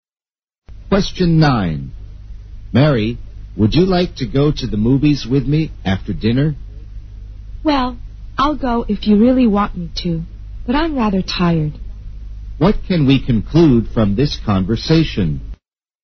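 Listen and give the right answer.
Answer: Mary is tired and doesn't really want to go to the movies.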